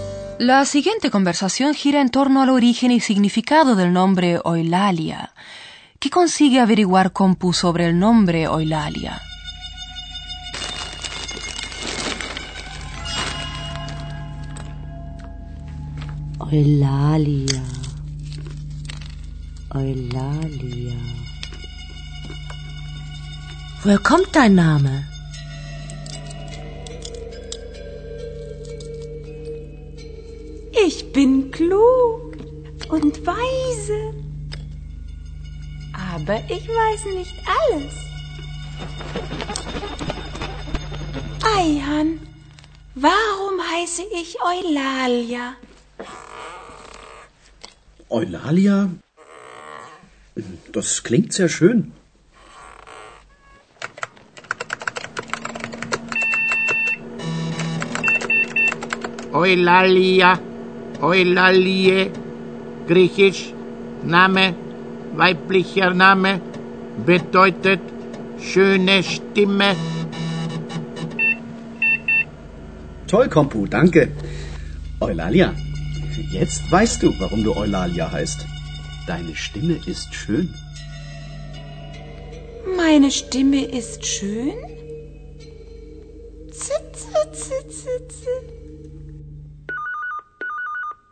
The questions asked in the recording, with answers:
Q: ¿Qué consigue averiguar Compu sobre el nombre Eulalia?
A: Por una parte, que Eulalia es un nombre griego, un nombre de mujer.